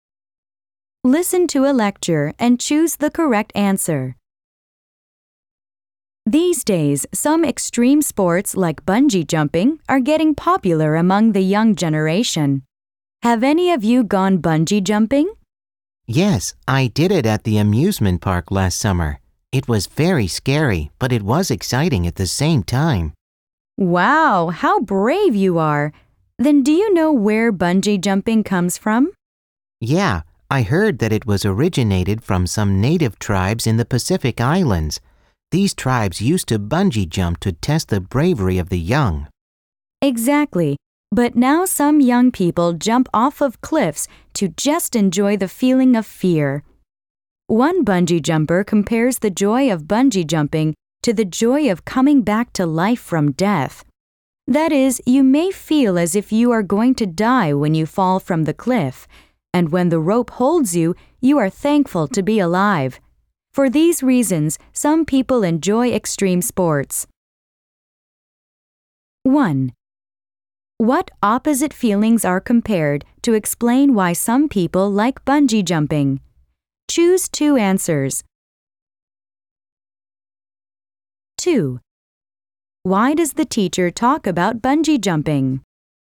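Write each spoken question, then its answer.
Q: What opposite feelings are compared to explain why some people like bungee jumping?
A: The fear of dying and the joy of being alive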